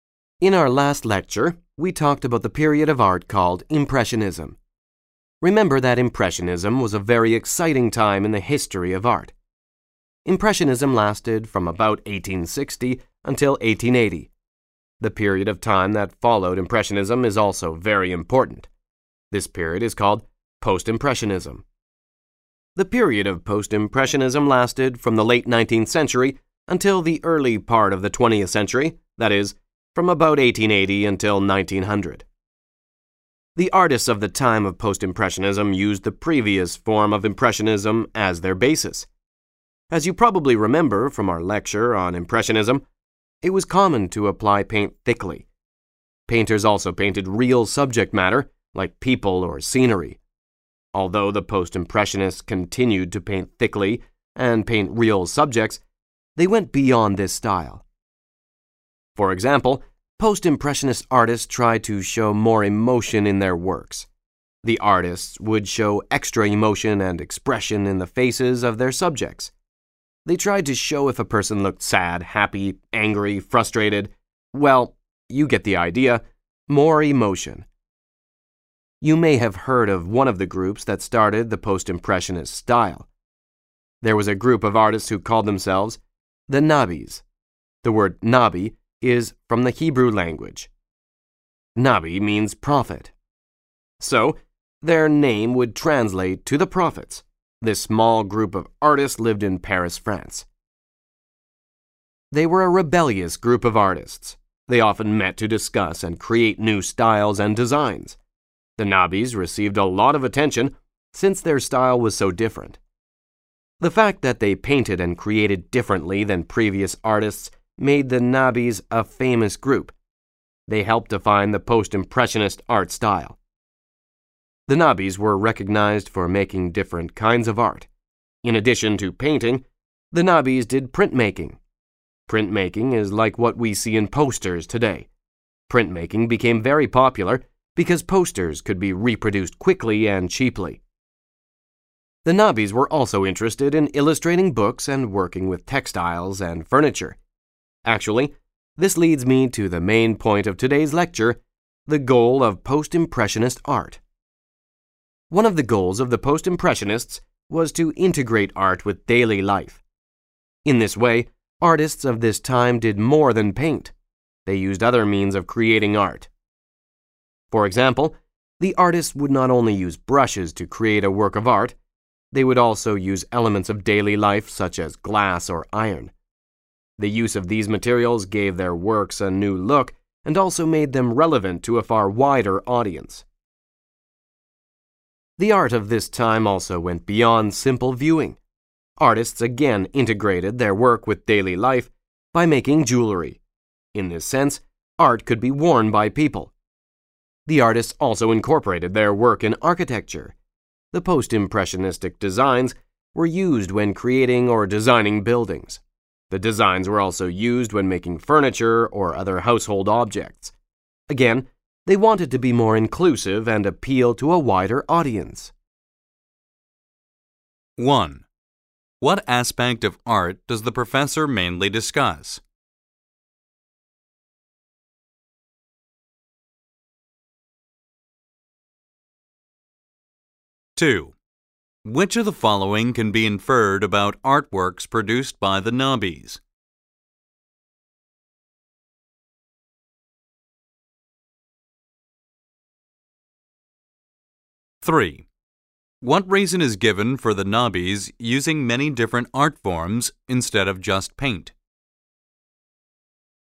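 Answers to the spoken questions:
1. Post-Impressionism and its goal of integrating art with daily life
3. To integrate art with daily life and appeal to a wider audience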